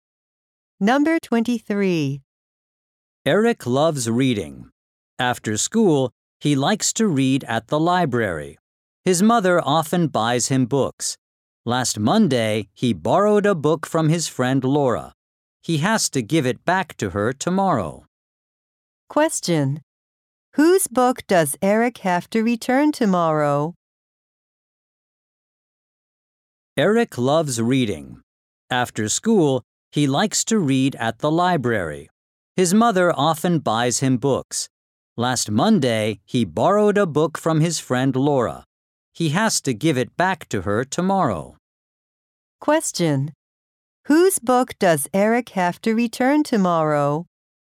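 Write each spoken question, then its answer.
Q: whose book does Eric have to return tomorrow?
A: Laura's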